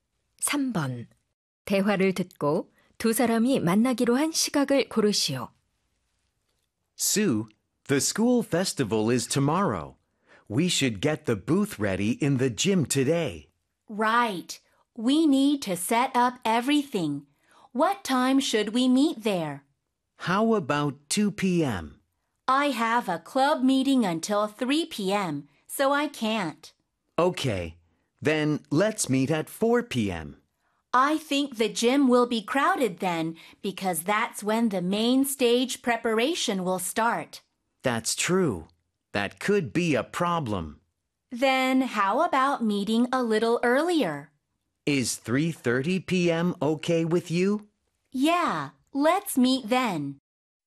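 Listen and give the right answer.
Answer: 오후 3시 30분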